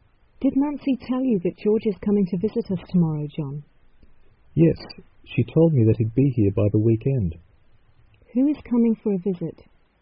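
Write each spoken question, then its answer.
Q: Who is coming for a visit?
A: George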